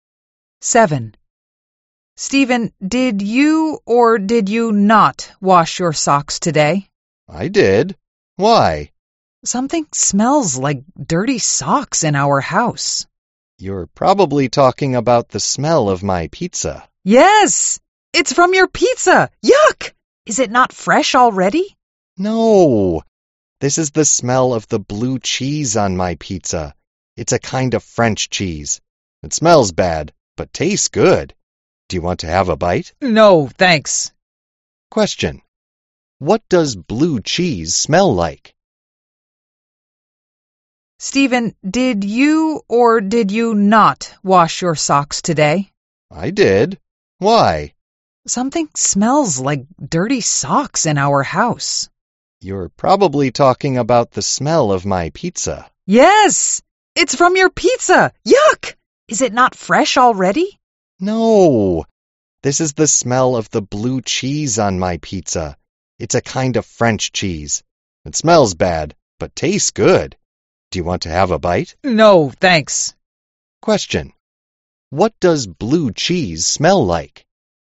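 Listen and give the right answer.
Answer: Dirty socks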